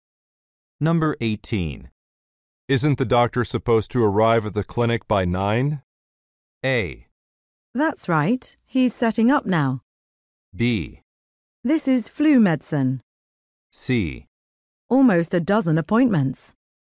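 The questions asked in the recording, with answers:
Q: Isn't the doctor supposed to arrive at the clinic by 9?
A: A: That's right. He's setting up now.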